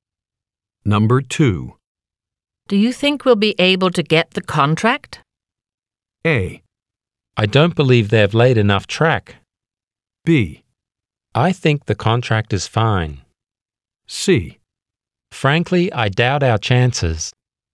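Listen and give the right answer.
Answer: C: Frankly, I doubt our chances.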